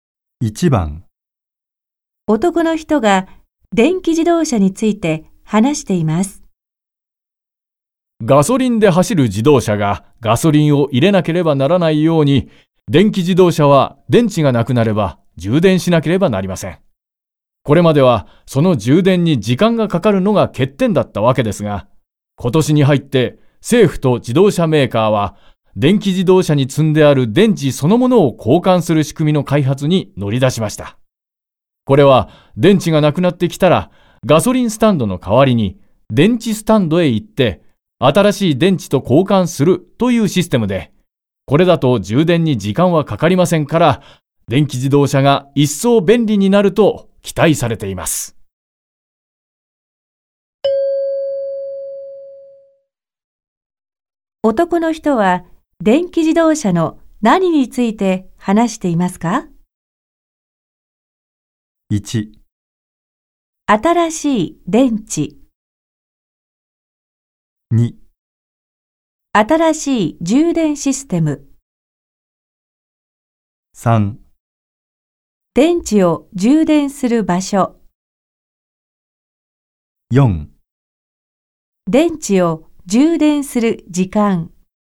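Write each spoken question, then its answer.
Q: 男の人は電気自動車の何について話していますか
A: 2: 新しい充電システム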